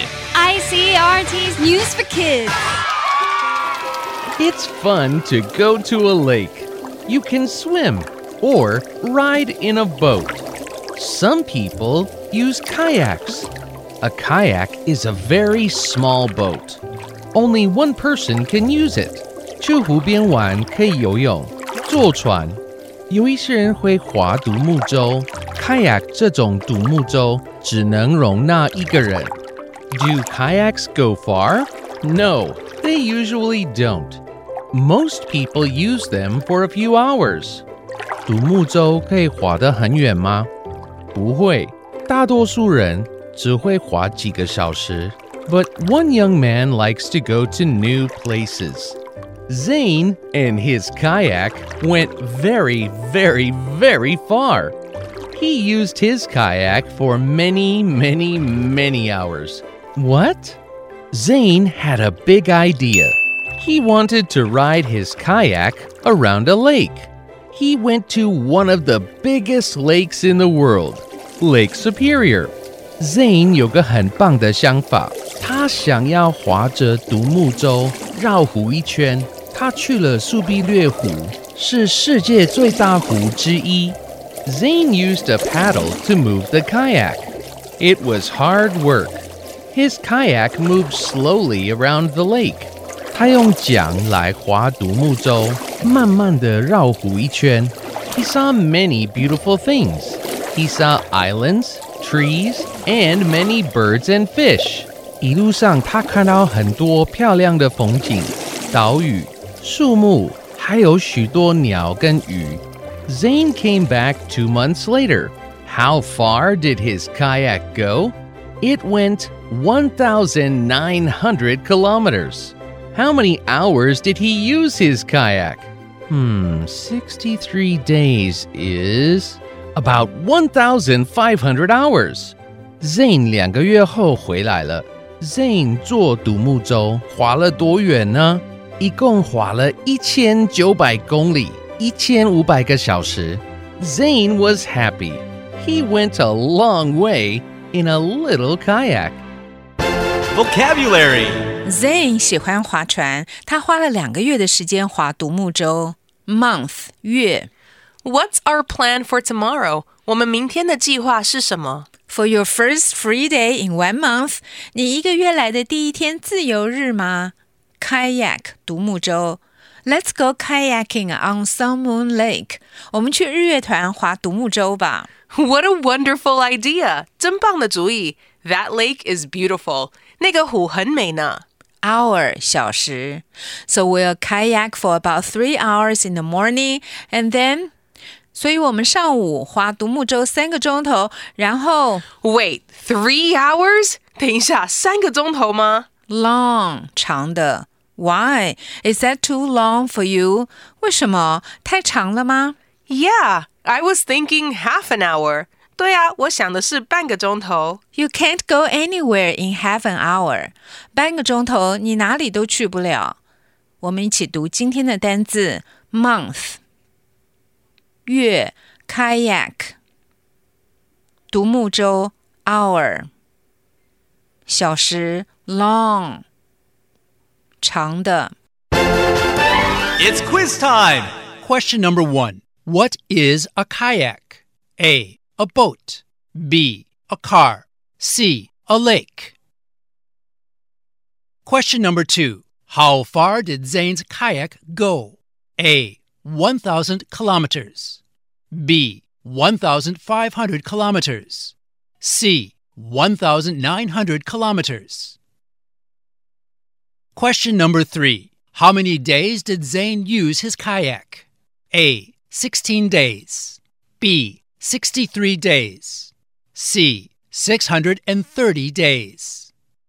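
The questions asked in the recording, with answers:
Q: What is a kayak?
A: A: A boat.

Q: How far did Zane's kayak go?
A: C: 1,900 kilometers.

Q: How many days did Zane use his kayak?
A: B: 63 days.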